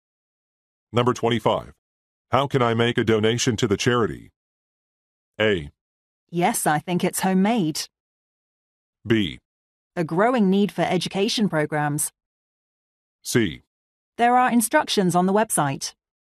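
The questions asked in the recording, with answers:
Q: How can I make a donation to the charity?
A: C: There are instructions on the website.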